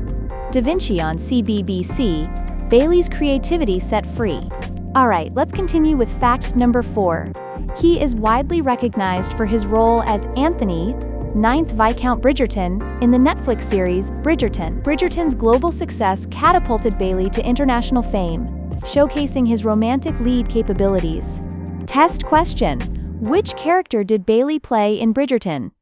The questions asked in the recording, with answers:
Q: Which character did Bailey play in Bridgerton?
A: Correct answer. Anthony, 9th, Viscount Bridgerton.